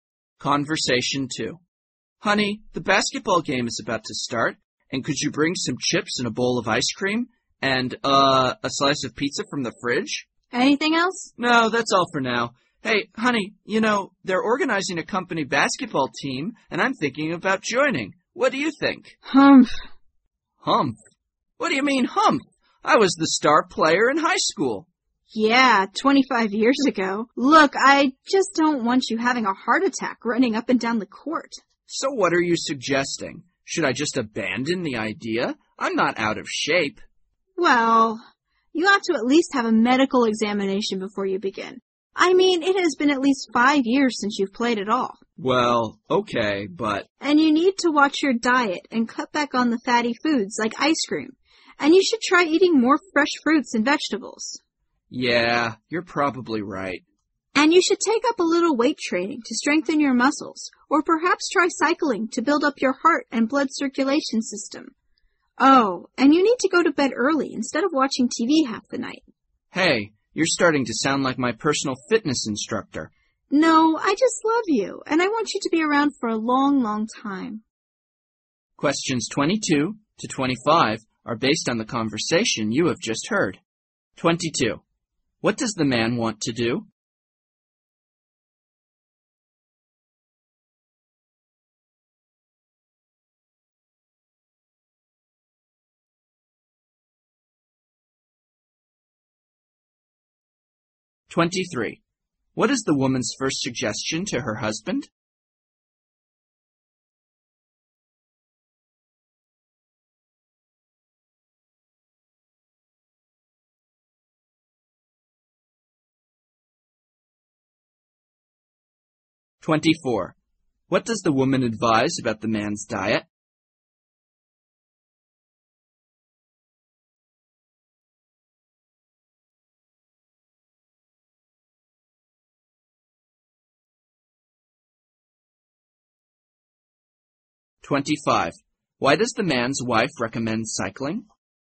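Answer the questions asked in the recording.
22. Join the company basketball team.
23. Have a medical examination.
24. Cut back on fatty foods and eat more fresh fruits and vegetables.
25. To build up his heart and blood circulation.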